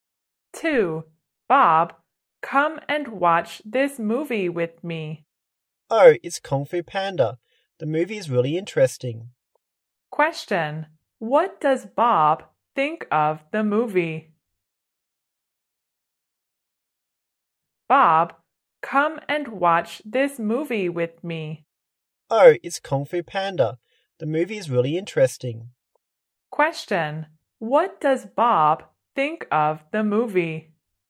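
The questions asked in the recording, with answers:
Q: What does Bob think of the movie?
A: Really interesting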